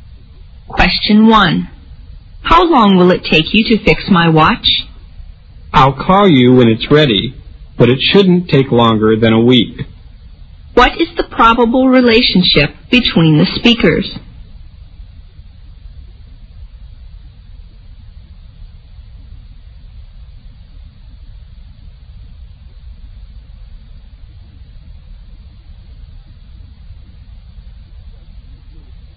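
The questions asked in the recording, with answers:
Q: What is the probable relationship between the speakers?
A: Customer and watch repairer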